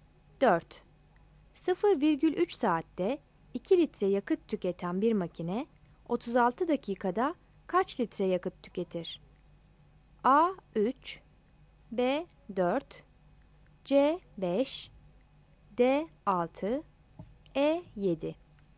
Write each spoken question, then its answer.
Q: 0,3 saatte 2 litre yakıt tüketen bir makine 36 dakikada kaç litre yakıt tüketir?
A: Yanıt B'dir.